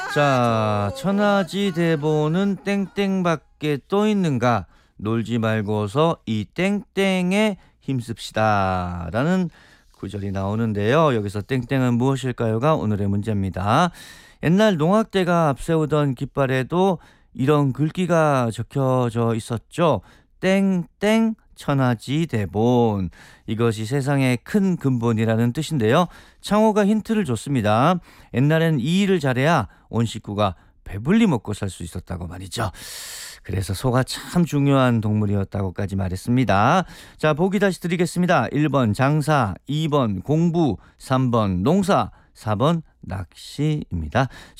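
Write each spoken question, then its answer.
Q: 여기서 땡땡은 무엇일까요가 오늘의 문제입니다.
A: 3: 농사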